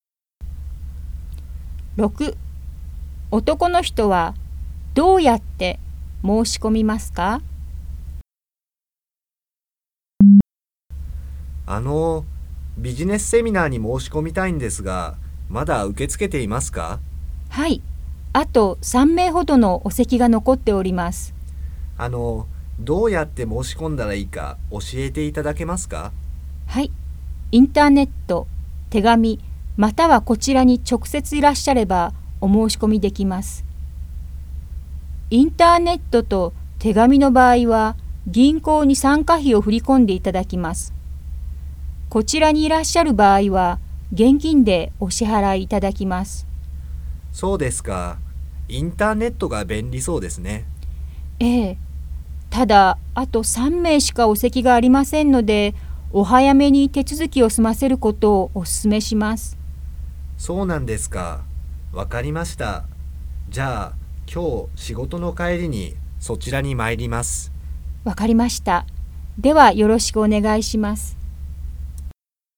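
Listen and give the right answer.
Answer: 今日仕事の帰りに直接行って現金で払う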